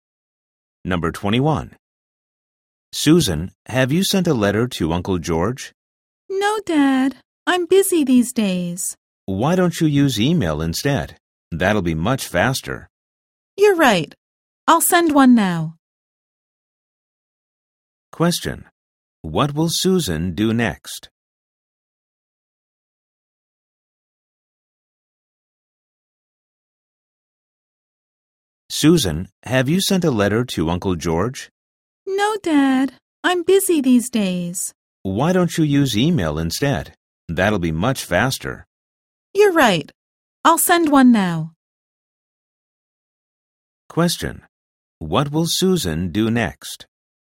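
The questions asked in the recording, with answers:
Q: What will Susan do next?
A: Send an email to Uncle George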